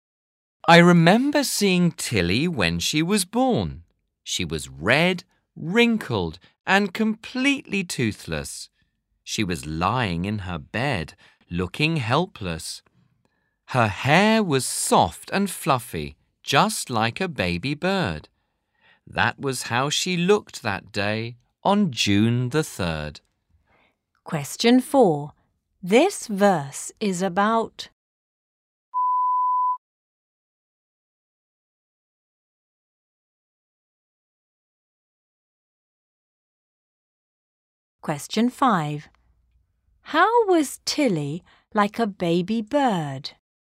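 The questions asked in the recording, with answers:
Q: How was Tilly like a baby bird?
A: Her hair was soft and fluffy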